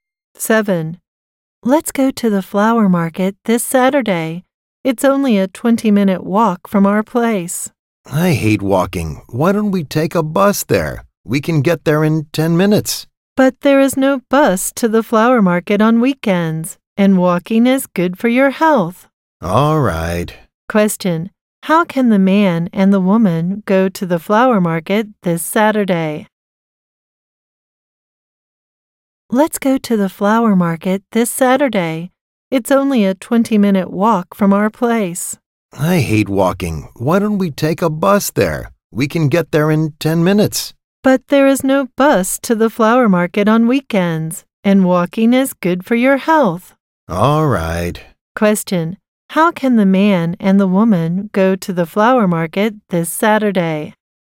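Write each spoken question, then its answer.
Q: Question: How can the man and the woman go to the flower market this Saturday?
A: On foot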